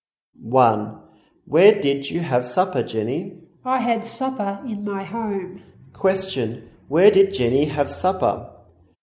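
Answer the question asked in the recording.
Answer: At home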